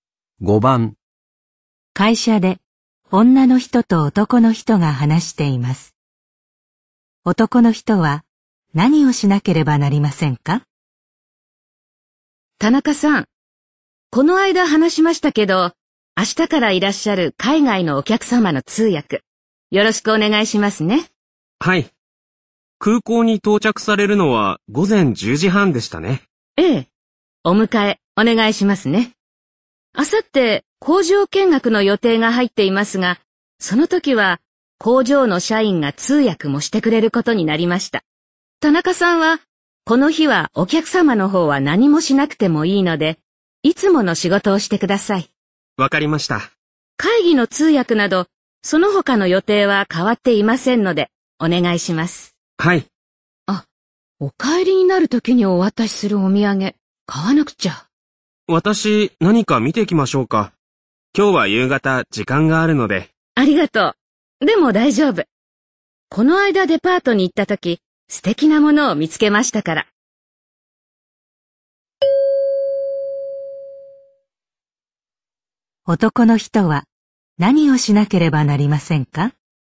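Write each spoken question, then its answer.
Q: 男の人は何をしなければなりませんか?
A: 空港へお客様を迎えに行き、会議などの通訳をする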